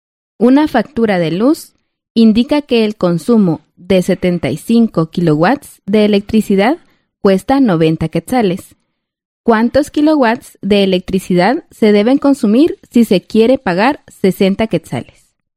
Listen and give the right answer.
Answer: Entonces, se debe consumir 50 kilowatts de electricidad.